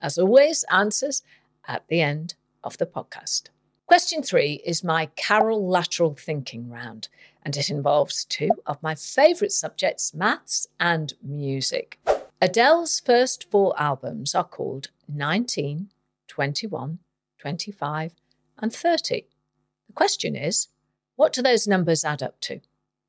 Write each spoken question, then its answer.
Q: The question is, what do those numbers add up to?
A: And they add up to 95.